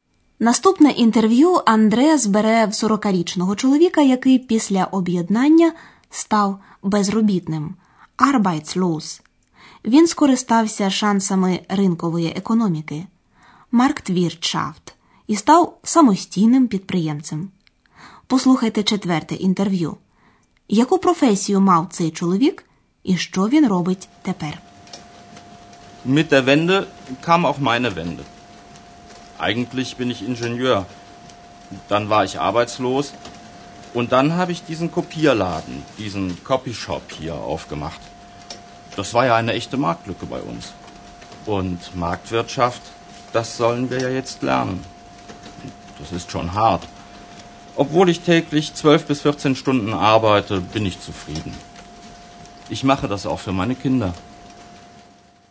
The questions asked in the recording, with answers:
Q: яку професію мав цей чоловік і що він робить тепер.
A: За професією це чоловік інженер.